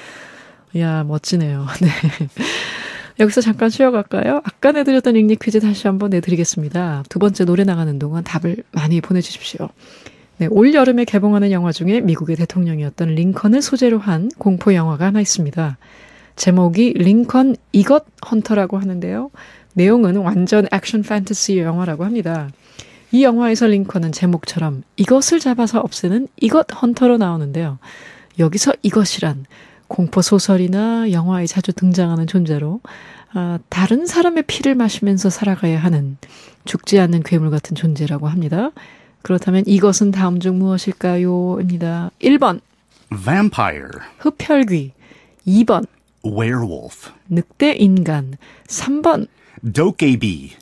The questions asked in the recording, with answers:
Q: 그렇다면 이것은 다음 중 무엇일까요? 입니다.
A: Number one, vampire.